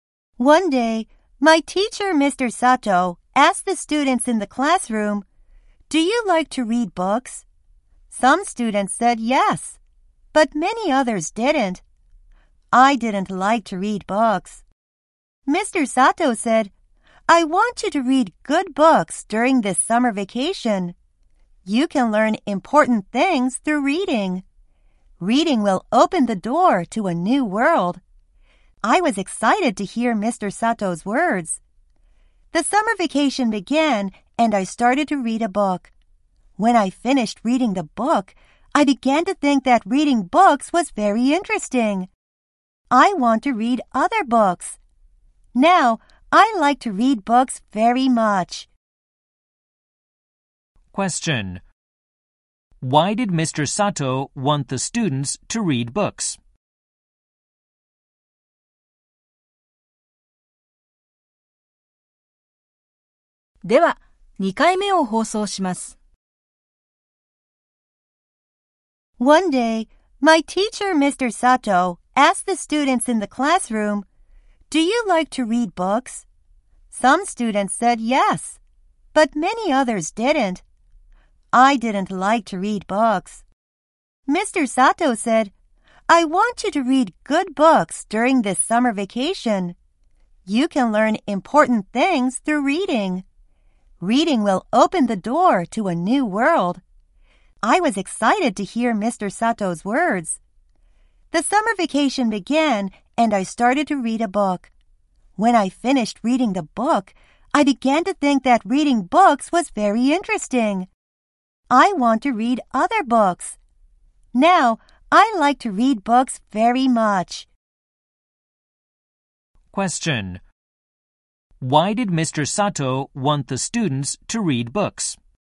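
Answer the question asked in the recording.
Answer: Because they can learn important things through reading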